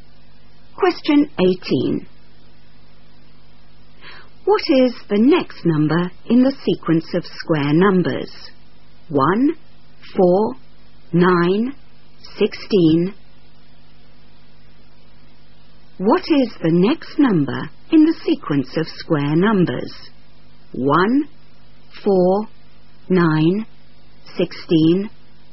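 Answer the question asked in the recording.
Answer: 25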